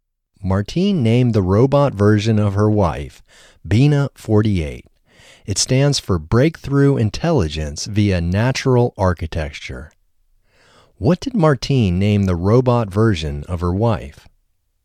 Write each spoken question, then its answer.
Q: What did Martine name the robot version of her wife?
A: Martine named the robot version of her wife Bina 48.